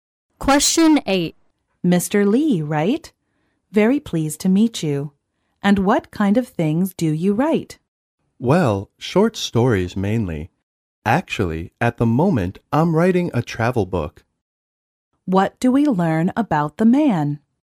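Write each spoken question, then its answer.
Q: What do we learn about the man?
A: He is a writer who is writing a travel book now.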